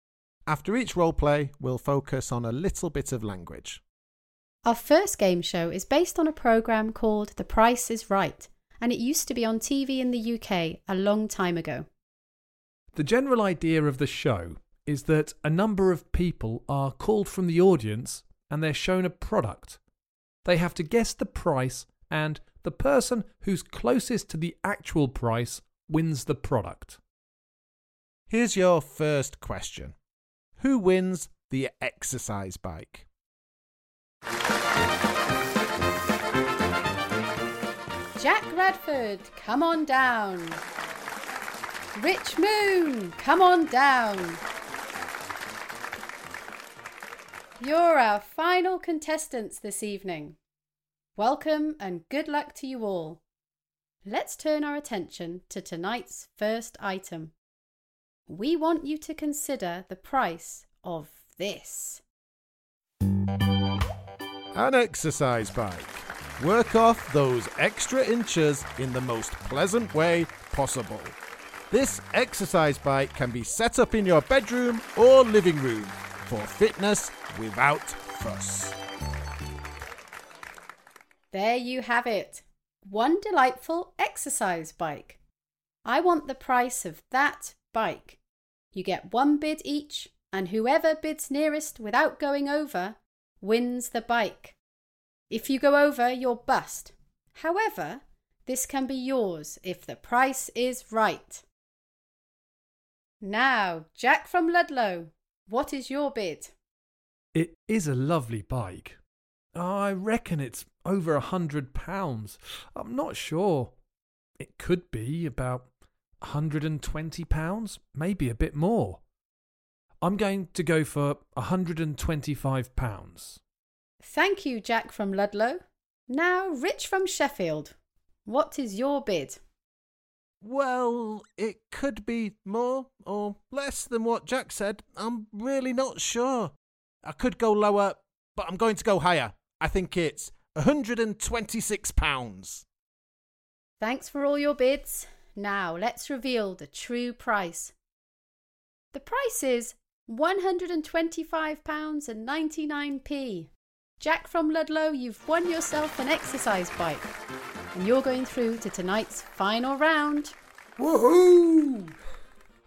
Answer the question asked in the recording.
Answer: The answer is me. I won the exercise bike.